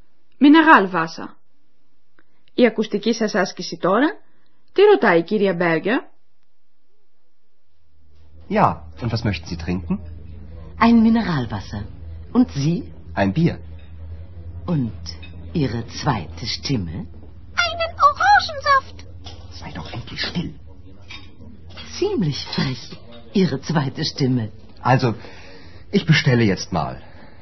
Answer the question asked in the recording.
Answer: Και η δεύτερη φωνή σας?